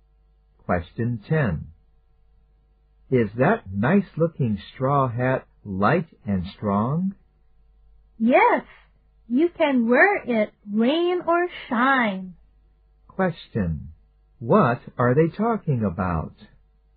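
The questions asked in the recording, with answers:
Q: What are they talking about?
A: A straw hat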